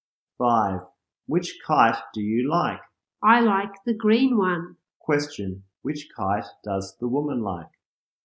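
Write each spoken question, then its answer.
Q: Which kite does the woman like?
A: The green one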